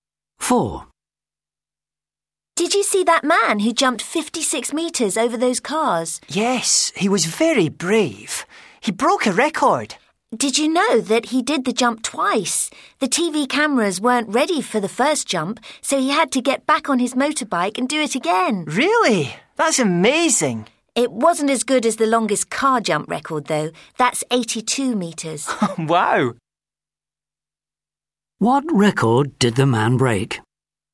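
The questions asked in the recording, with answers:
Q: What record did the man break?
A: Jumping 56 metres over cars on a motorbike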